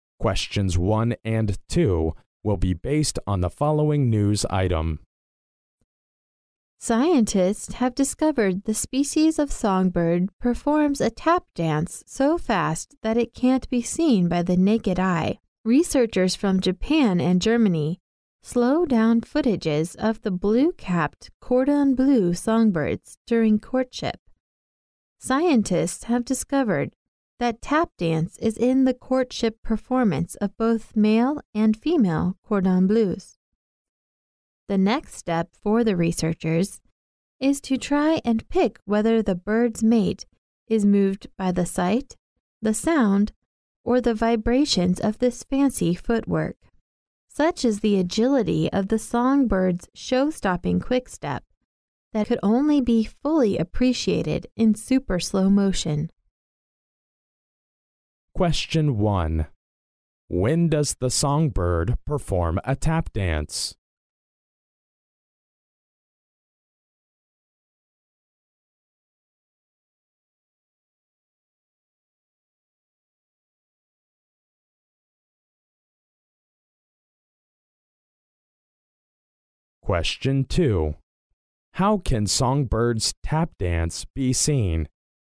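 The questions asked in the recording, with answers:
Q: When does the songbird perform a tap dance?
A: During courtship.

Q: How can songbirds tap dance be seen?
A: Only in super slow motion.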